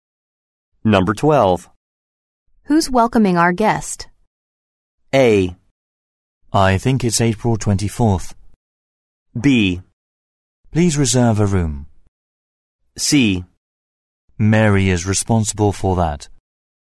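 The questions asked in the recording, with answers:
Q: Who's welcoming our guest?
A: C: Mary is responsible for that.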